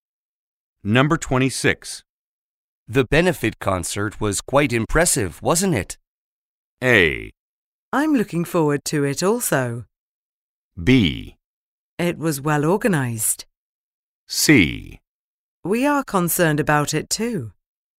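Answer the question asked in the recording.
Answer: B: It was well organized.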